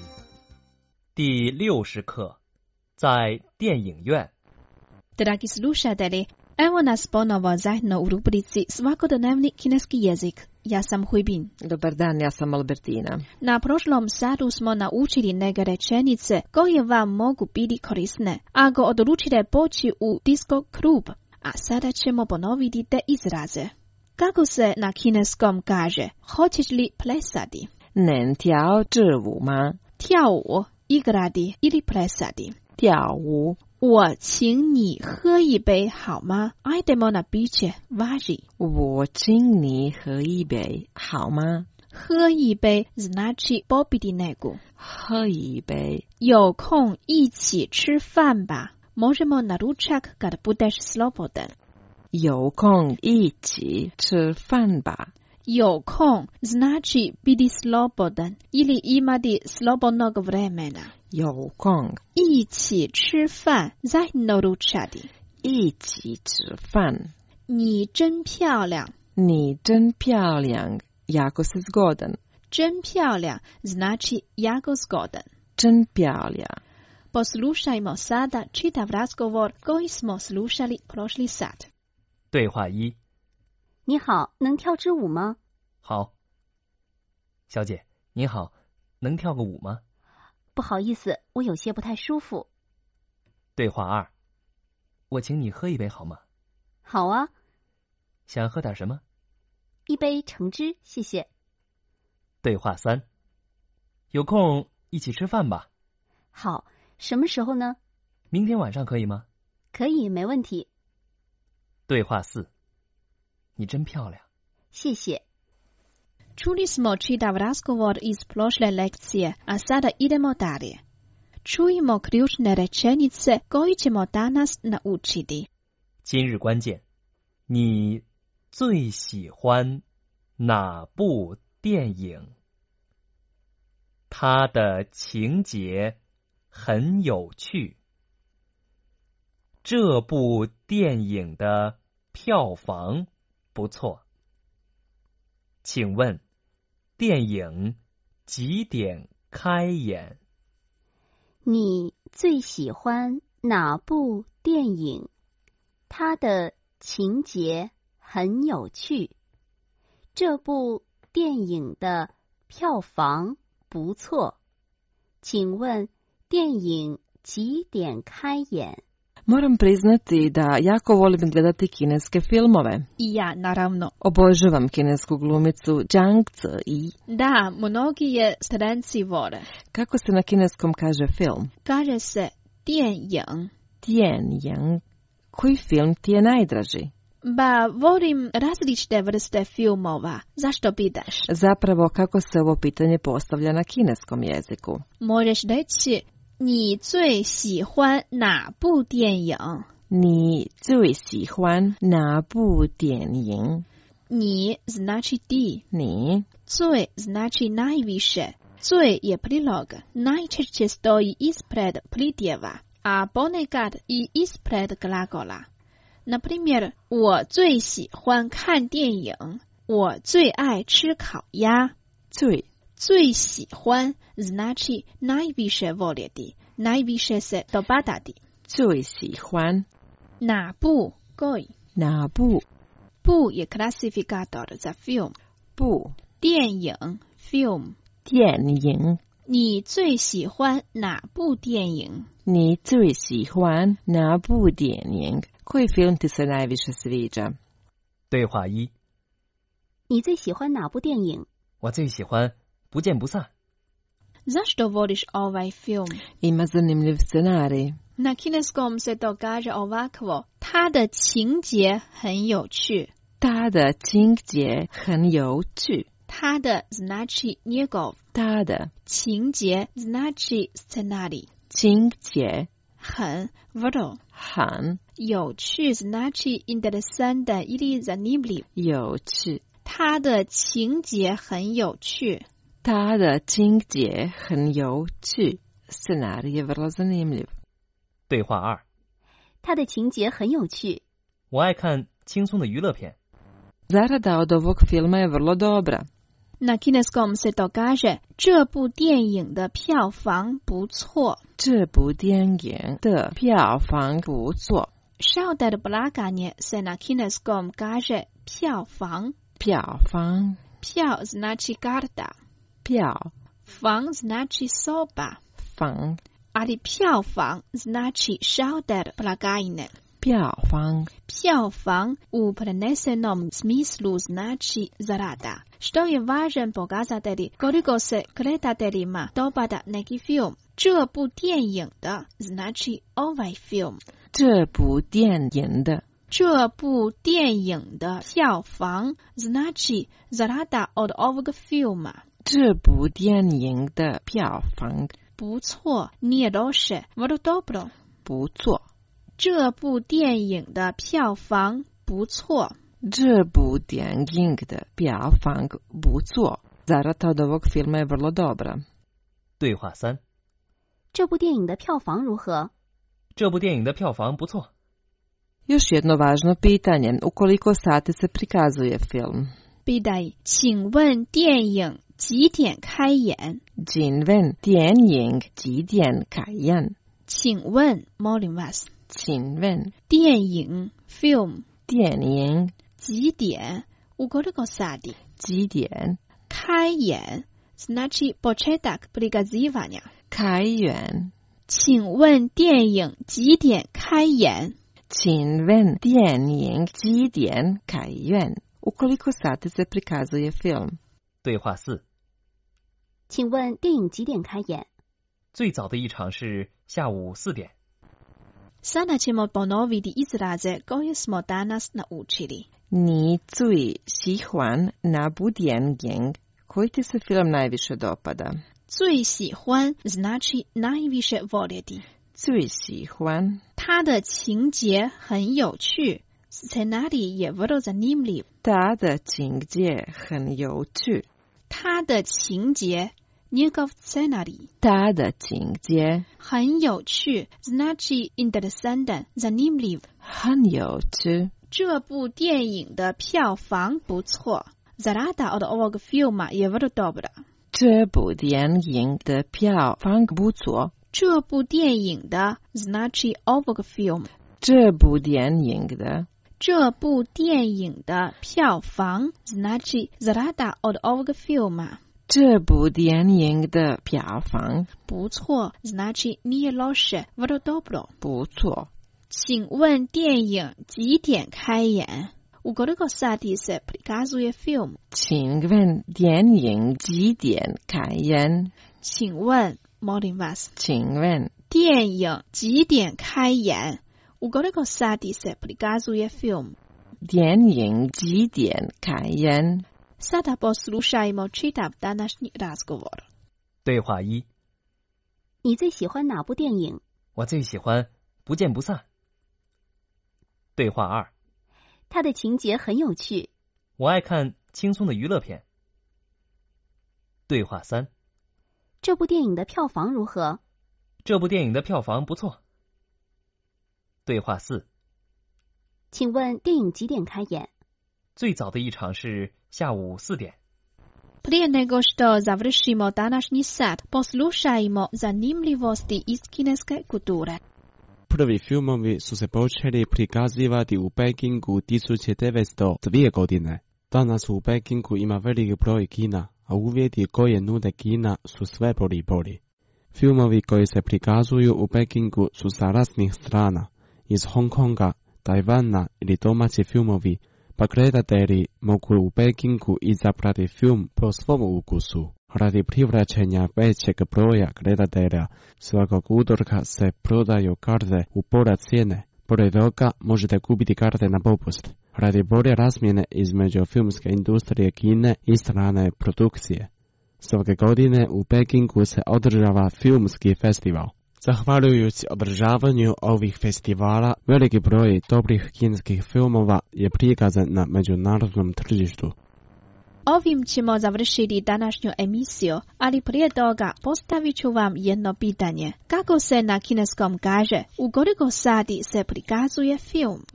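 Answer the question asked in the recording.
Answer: 请问电影几点开演?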